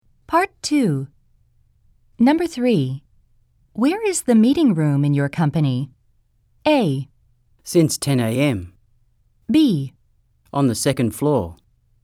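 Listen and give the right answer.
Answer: B: On the second floor.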